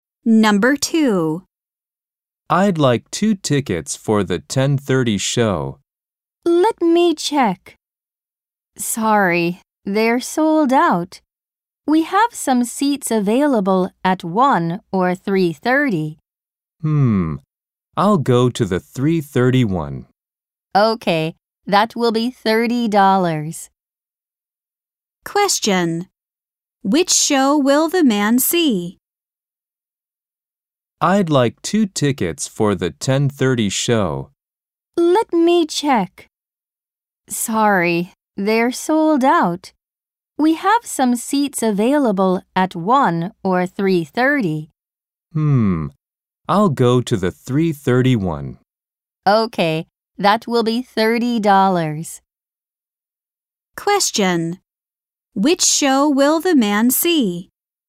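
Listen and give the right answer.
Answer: The 3:30 show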